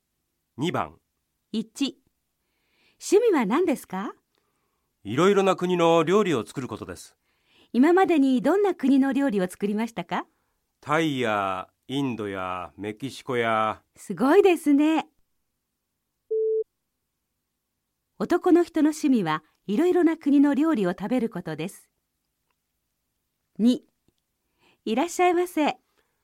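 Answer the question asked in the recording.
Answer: ×(いろいろな国の料理を作ることです)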